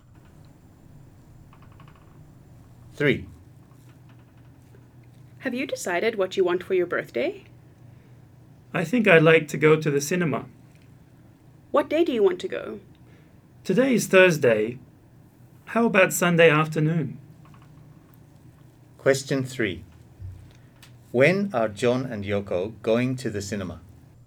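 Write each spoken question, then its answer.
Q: When are John and Yoko going to the cinema?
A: On Sunday afternoon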